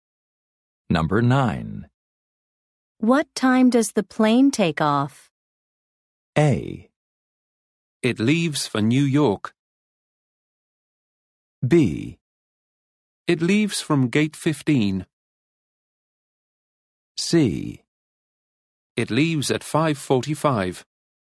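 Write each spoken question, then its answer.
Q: What time does the plane take off?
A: C: It leaves at 5:45.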